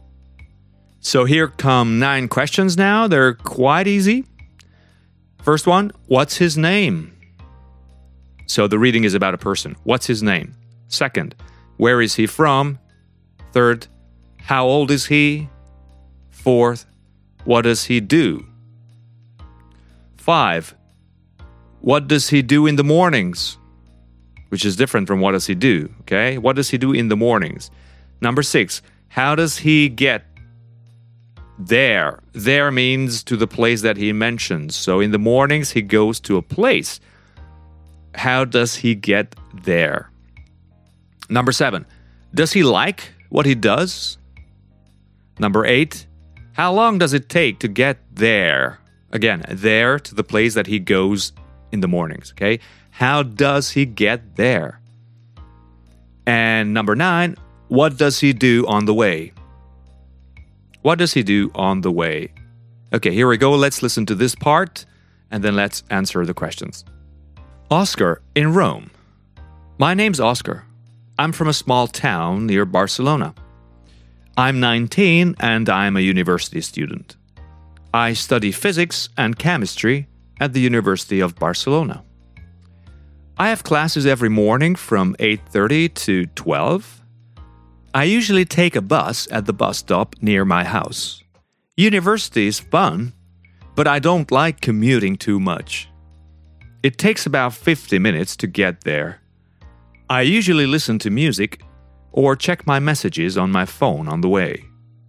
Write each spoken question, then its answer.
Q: What's his name?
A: Well, his name is Oscar.

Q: Where is he from?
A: He's from a small town near Barcelona.

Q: How old is he?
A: He's 19.

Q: What does he do?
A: Well, he's a university student.

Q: what does he do in the mornings?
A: Well, he has classes in the mornings from 8:30 to 12 o'clock.

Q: how does he get there?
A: Well, he takes a bus.

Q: does he like what he does?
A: Yeah, he does. He likes university, he thinks it's fun, but he doesn't like commuting.

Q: how long does it take to get there?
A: So it takes him about 50 minutes.

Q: what does he do on the way?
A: He usually listens to music or checks his messages on the phone.